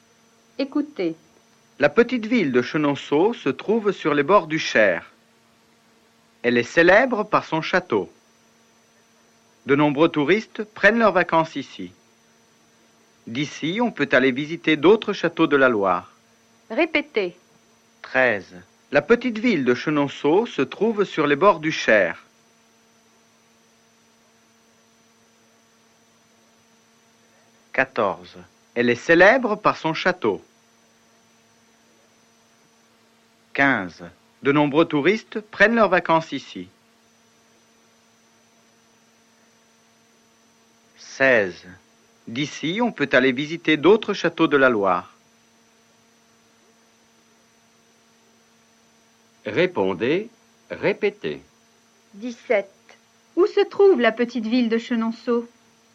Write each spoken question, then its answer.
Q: Où se trouve la petite ville de Chenonceau?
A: La petite ville de Chenonceau se trouve sur les bords du Cher.